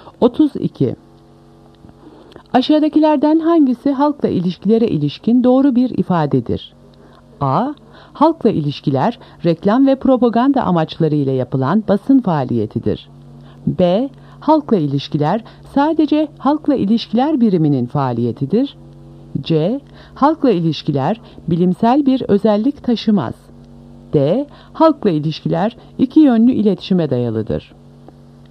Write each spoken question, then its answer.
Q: Aşağıdakilerden hangisi halkla ilişkilere ilişkin doğru bir ifadedir?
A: Doğru cevap D. Halkla ilişkiler iki yönlü iletişime dayalıdır.